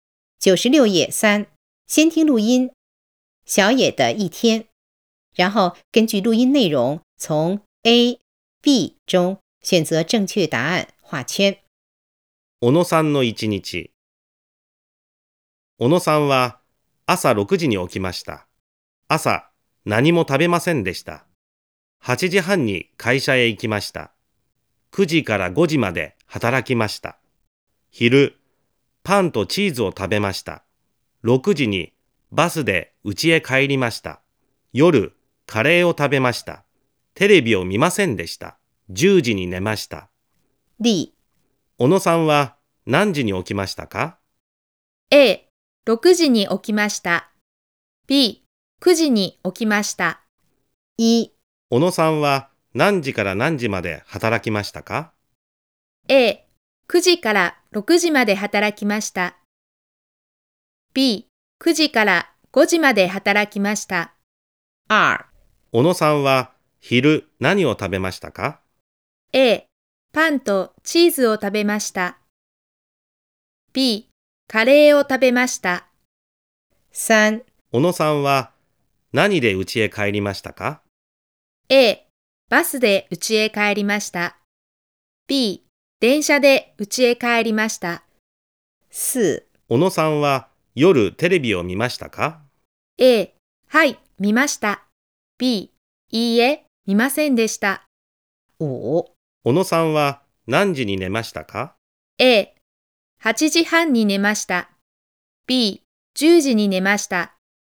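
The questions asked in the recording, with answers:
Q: 小野さんは何時に起きましたか?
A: A: 6時に起きました。

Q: 小野さんは何時から何時まで働きましたか?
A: B: 9時から5時まで働きました。

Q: 小野さんは昼何を食べましたか?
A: A: パンとチーズを食べました。

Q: 小野さんは何で家へ帰りましたか?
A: A: バスで家へ帰りました。

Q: 小野さんは夜テレビを見ましたか?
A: B: いいえ、見ませんでした。

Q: 小野さんは何時に寝ましたか?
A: B: 10時に寝ました。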